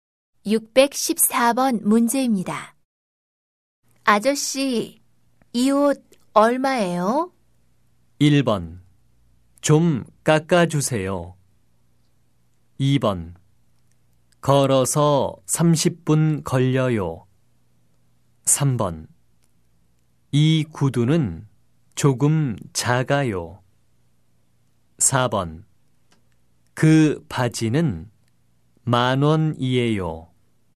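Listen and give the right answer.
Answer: 4: 그 바지는 만 원이에요.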